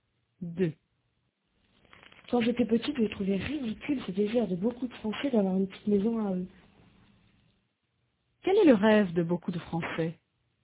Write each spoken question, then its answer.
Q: Quel est le rêve de beaucoup de Français ?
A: D'avoir une petite maison à eux.